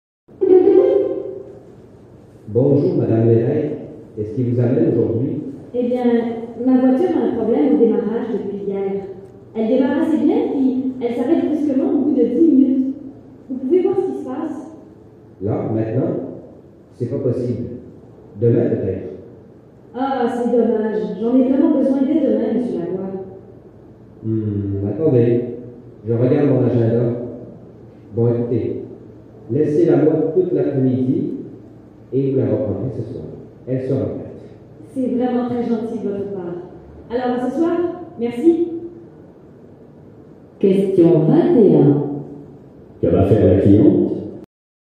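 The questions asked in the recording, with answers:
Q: Que va faire la cliente ?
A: Laisser sa voiture au garage tout l'après-midi et la reprendre le soir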